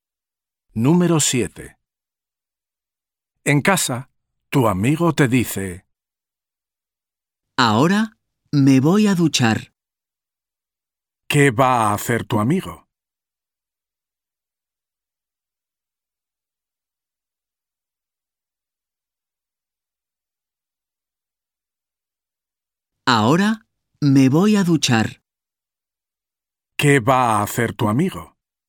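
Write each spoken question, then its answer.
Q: ¿Qué va a hacer tu amigo?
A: ducharse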